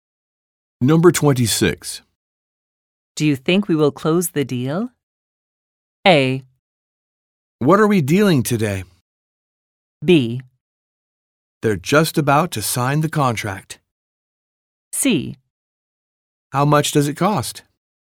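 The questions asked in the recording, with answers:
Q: Do you think we will close the deal?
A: B: They're just about to sign the contract.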